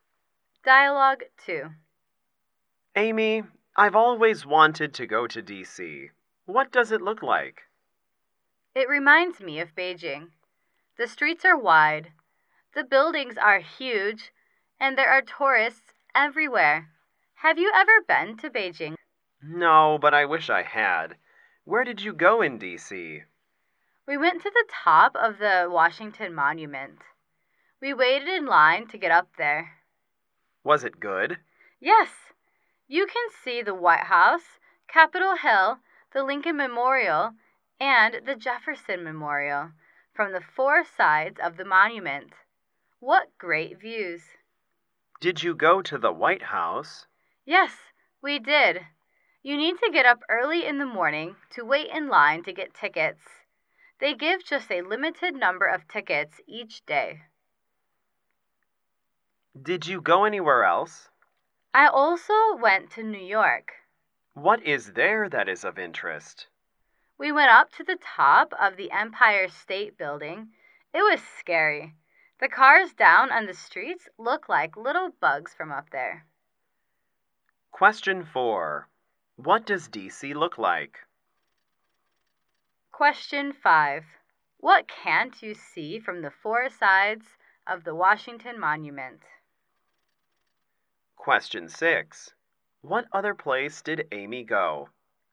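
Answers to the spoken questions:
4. It looks like Beijing
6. New York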